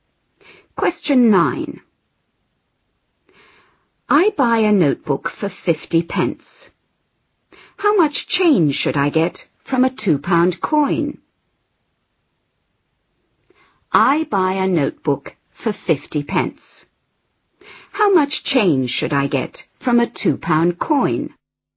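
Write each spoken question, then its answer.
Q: How much change should I get from a £2 coin?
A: £1.50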